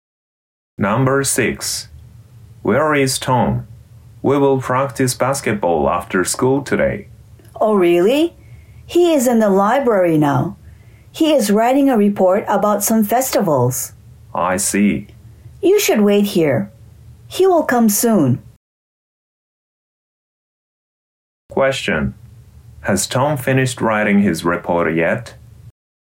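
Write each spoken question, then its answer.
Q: Has Tom finished writing his report yet?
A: No, he hasn't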